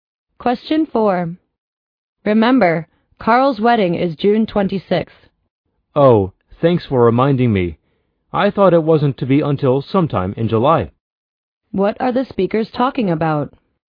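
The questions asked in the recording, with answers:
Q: What are the speakers talking about?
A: The date of Carl's wedding.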